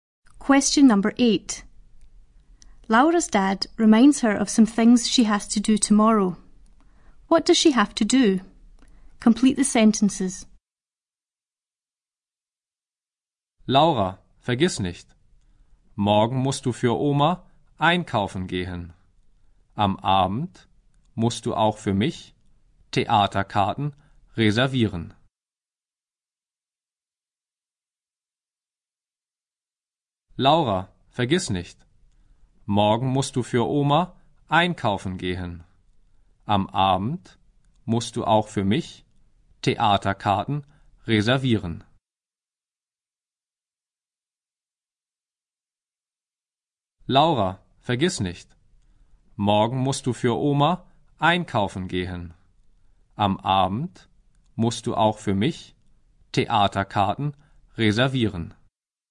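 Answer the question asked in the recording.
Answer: Go shopping for her grandma; in the evening reserve theatre tickets for her dad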